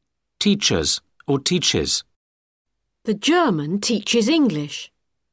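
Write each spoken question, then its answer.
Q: Teachers or teaches.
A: teaches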